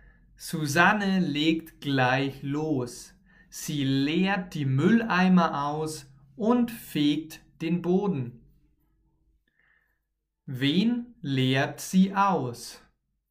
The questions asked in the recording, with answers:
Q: Wen leert sie aus?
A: den Mülleimer oder die Mülleimer.